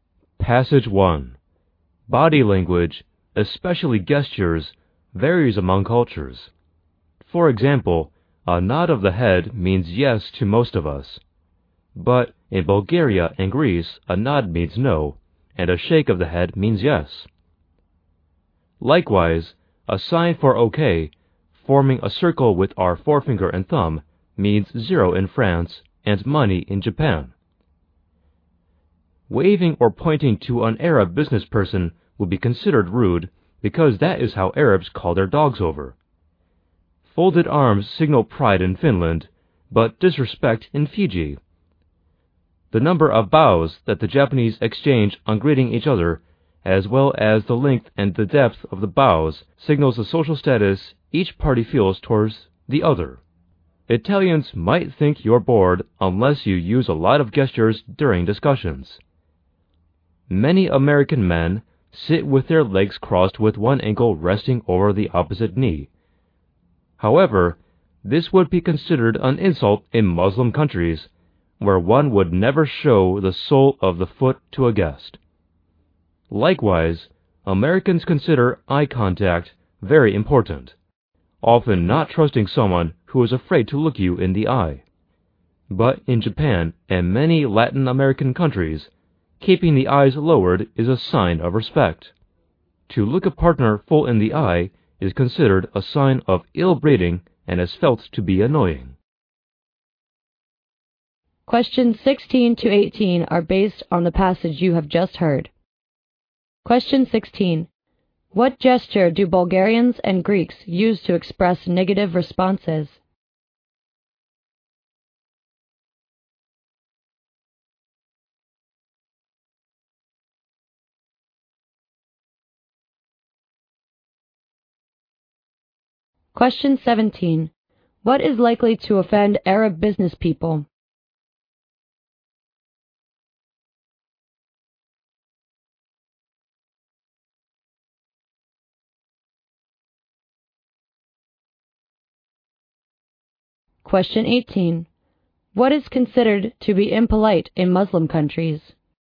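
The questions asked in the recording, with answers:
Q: What gesture do Bulgarians and Greeks use to express negative responses?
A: A nod of the head.

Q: What is likely to offend Arab business people?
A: Waving or pointing to them.

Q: What is considered to be impolite in Muslim countries?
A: Showing the sole of the foot to a guest.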